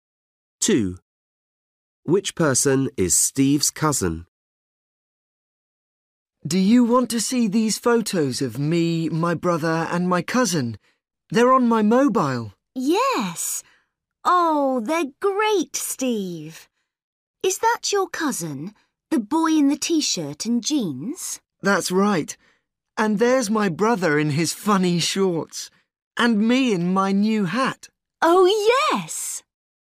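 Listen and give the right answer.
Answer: the boy in the T-shirt and jeans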